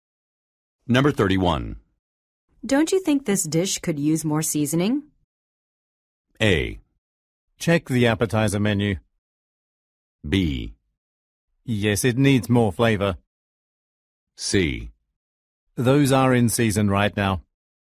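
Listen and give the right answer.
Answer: B: Yes, it needs more flavor.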